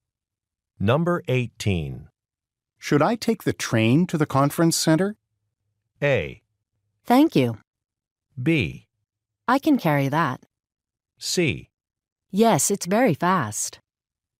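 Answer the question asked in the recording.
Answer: C: Yes, it's very fast.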